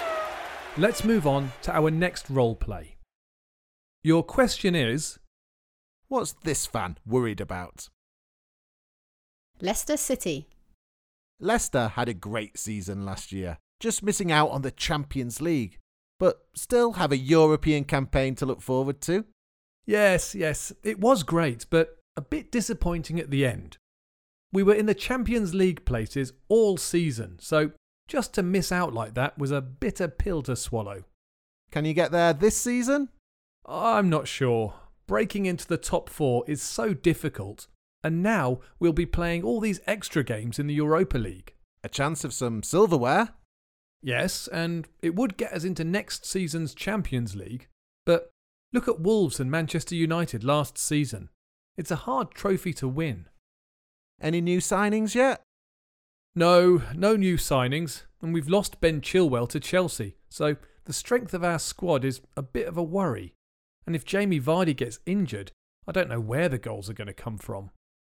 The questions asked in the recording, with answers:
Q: what's this fan worried about?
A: But he was probably most worried about the possibility of Jamie Vardy getting injured.